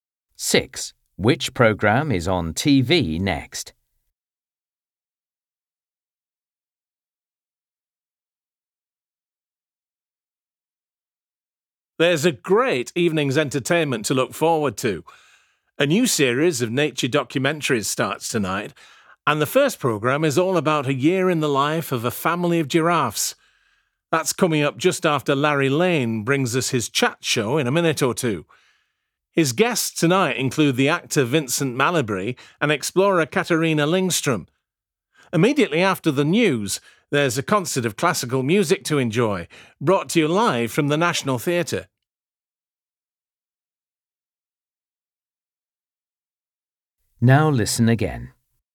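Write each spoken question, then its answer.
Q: Which programme is on TV next?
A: Larry Lane's chat show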